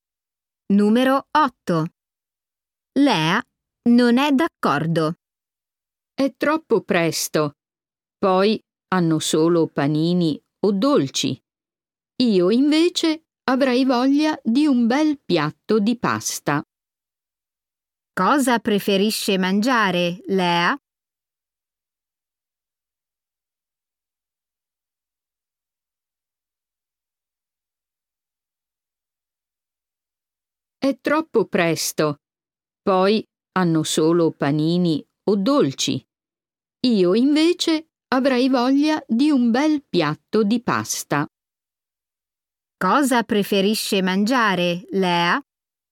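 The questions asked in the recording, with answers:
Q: Cosa preferisce mangiare, Lea?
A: un piatto di pasta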